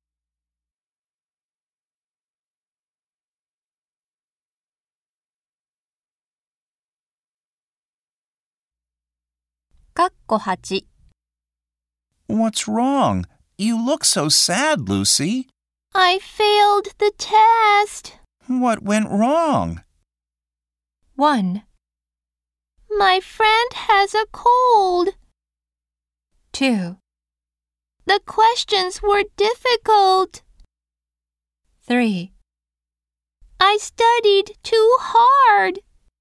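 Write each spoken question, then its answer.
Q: What went wrong?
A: 2: The questions were difficult.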